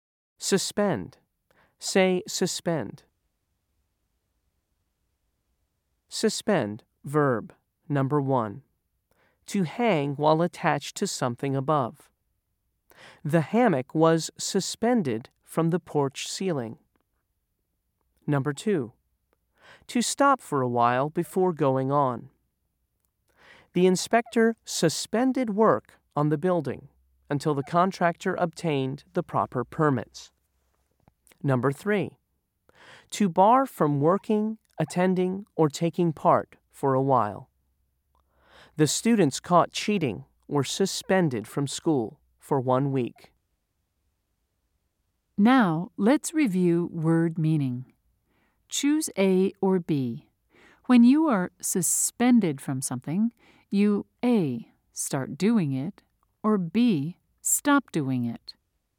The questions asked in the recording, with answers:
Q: Choose A or B. When you are suspended from something, you A, start doing it, or B, stop doing it.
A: If you said B, you're right.